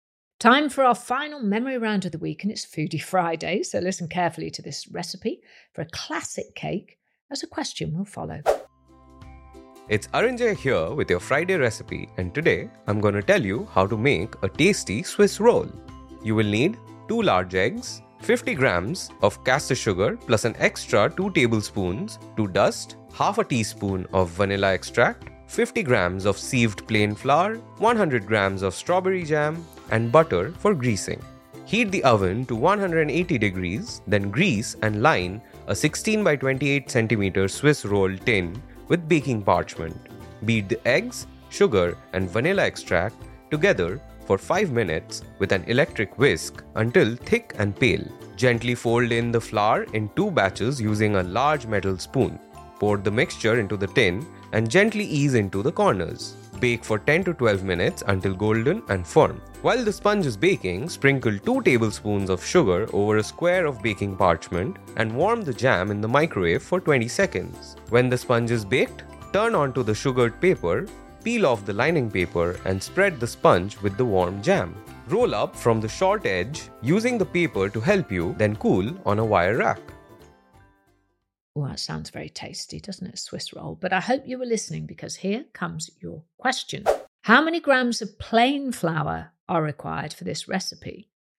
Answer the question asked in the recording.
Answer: The answer is 50 grams of plain flour.